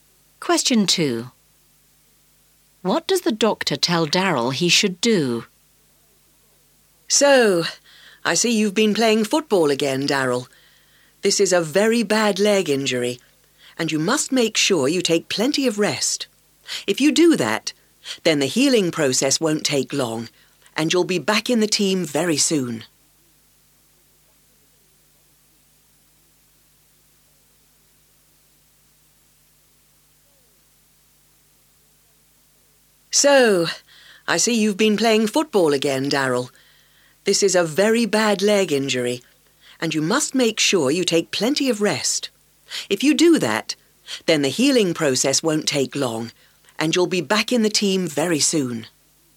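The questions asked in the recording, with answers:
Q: What does the doctor tell Daryl he should do?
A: Take plenty of rest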